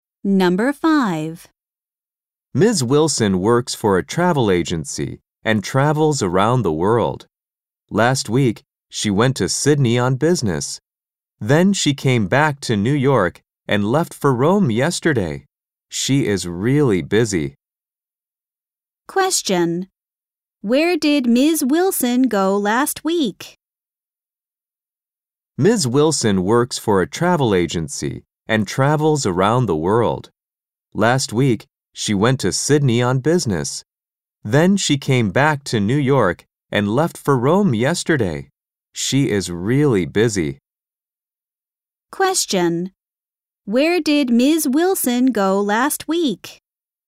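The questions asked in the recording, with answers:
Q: Where did Ms. Wilson go last week?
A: To Sydney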